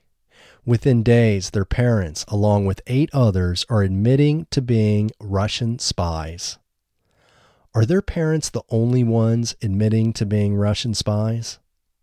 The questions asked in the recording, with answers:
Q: Are their parents the only ones admitting to being Russian spies?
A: No, their parents aren't the only ones admitting to being Russian spies.